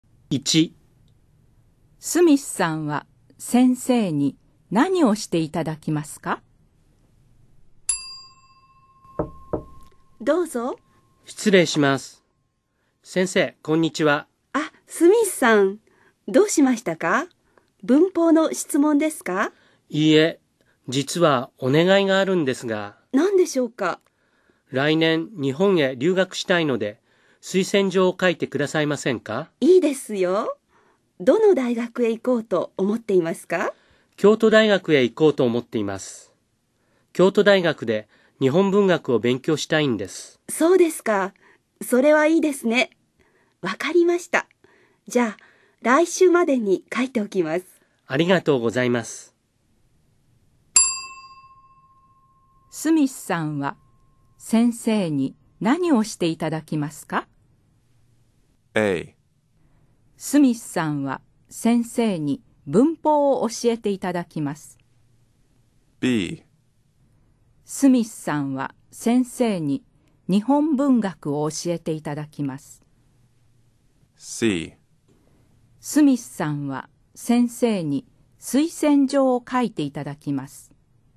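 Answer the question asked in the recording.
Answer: C: スミスさんは先生に推薦状を書いていただきます。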